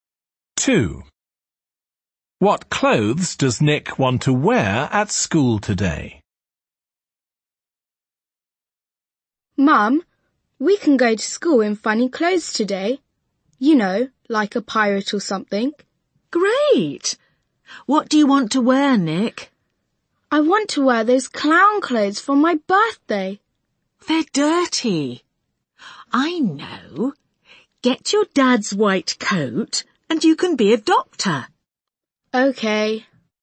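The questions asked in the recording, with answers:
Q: What clothes does Nick want to wear at school today?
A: Doctor's clothes (his dad's white coat)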